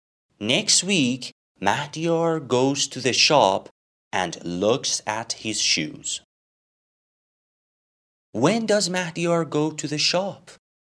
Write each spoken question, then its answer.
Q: When does Mahdiyar go to the shop?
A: Next week.